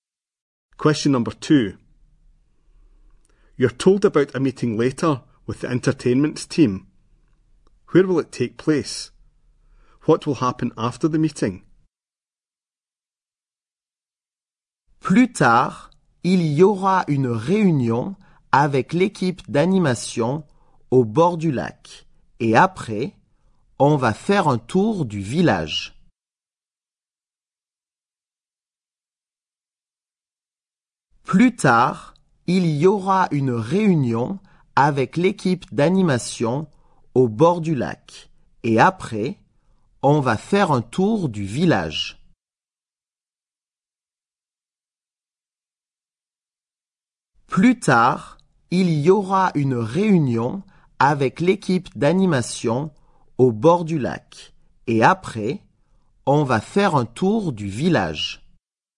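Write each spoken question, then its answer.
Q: Where will it take place?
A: By the lake

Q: What will happen after the meeting?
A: A tour of the village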